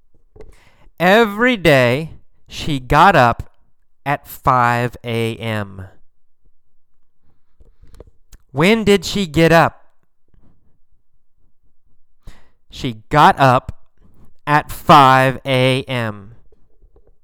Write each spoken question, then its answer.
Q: When did she get up?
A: She got up at 5 a.m.